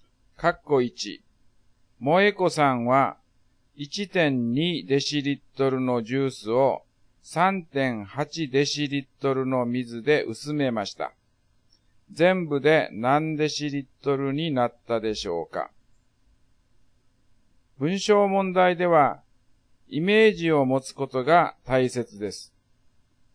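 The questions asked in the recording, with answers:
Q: 全部で何デシリットルになったでしょうか?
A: 5デシリットル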